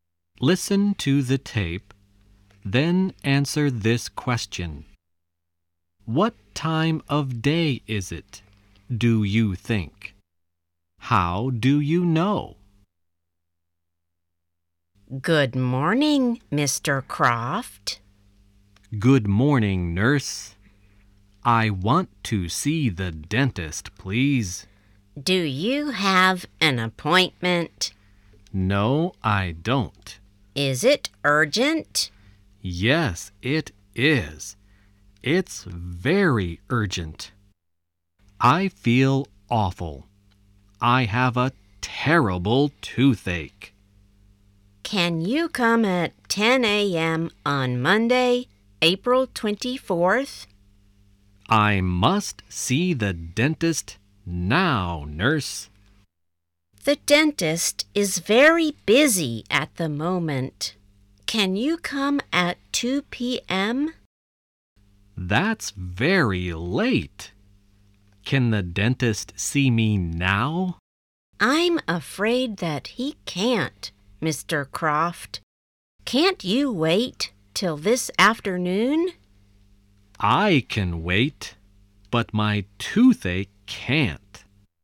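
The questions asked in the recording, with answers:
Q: What time of day is it, do you think?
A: Morning (they say "Good morning")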